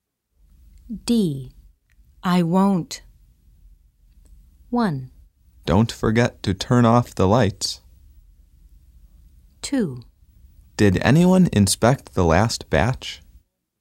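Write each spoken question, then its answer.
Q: I won't.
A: 1: Don't forget to turn off the lights.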